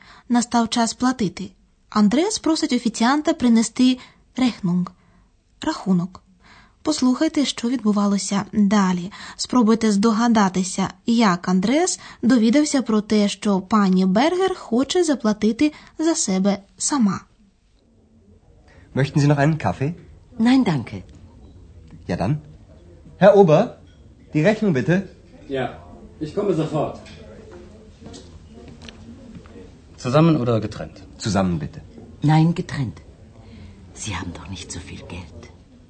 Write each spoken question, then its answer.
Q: Спробуйте здогадатися, як Андрес довідався про те, що пані Бергер хоче заплатити за себе сама.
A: Але пані Бергер заперечує, вона хоче заплатити за себе сама.